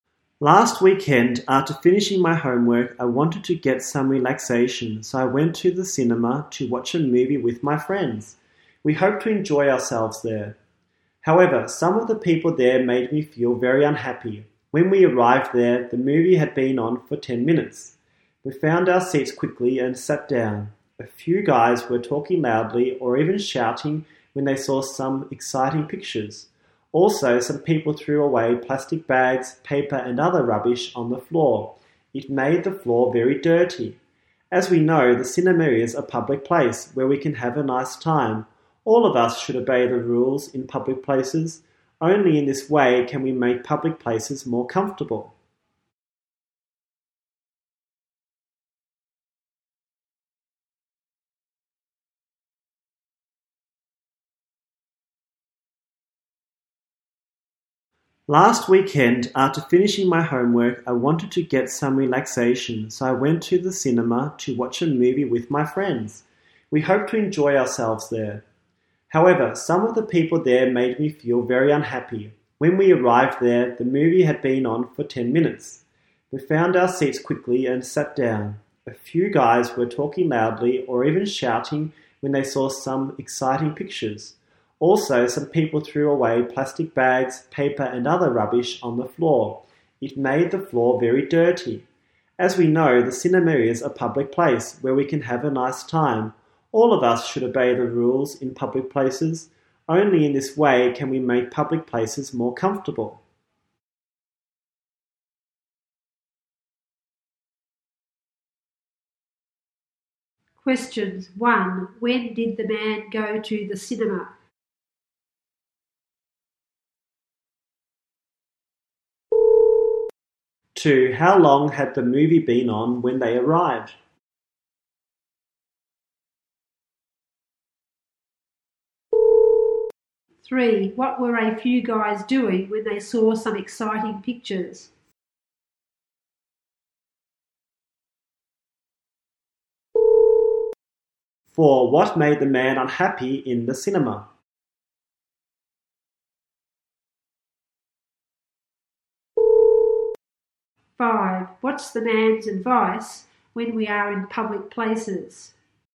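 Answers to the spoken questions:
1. Last weekend
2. 10 minutes
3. Talking loudly or even shouting
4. Some people's bad behaviour (talking loudly and throwing rubbish)
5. We should obey the rules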